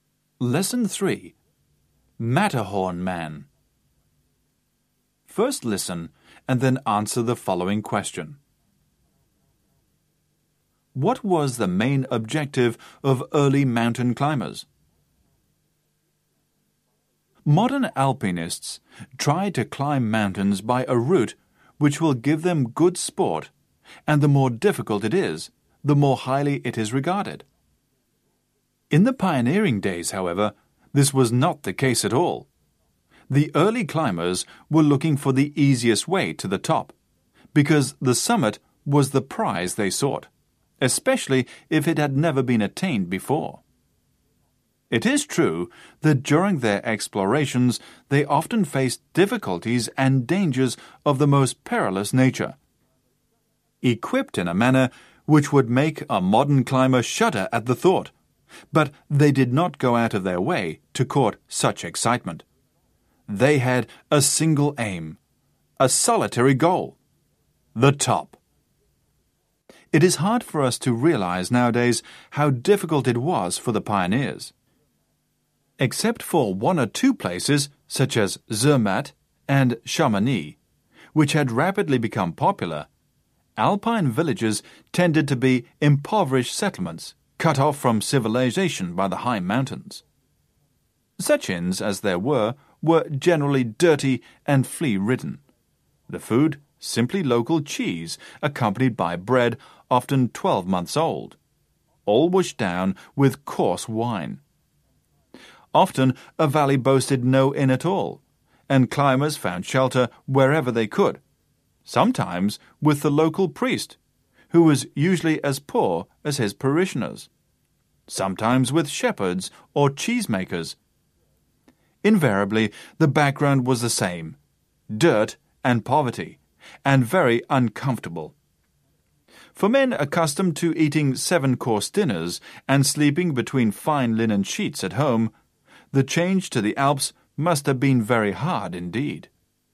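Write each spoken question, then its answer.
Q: What was the main objective of early mountain climbers?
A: To reach the summit (the top) by the easiest way, especially if it had never been reached before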